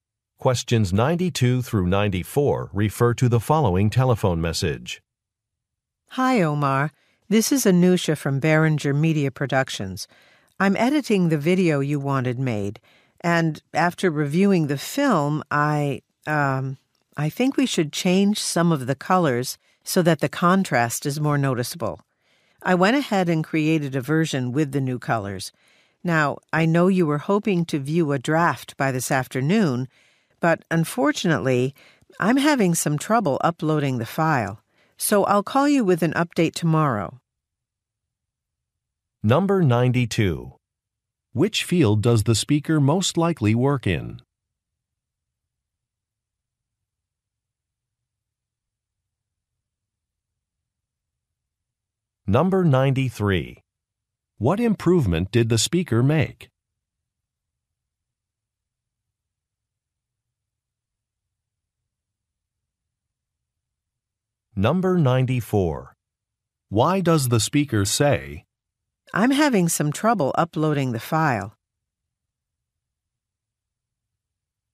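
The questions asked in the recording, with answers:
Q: Which field does the speaker most likely work in?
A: Video production

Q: What improvement did the speaker make?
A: She changed the colors to make the contrast more noticeable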